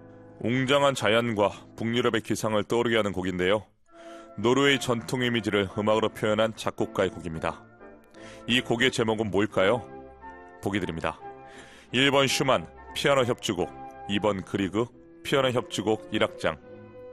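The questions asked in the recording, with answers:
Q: 이 곡의 제목은 뭘까요?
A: 2번: 그리그 피아노 협주곡 1악장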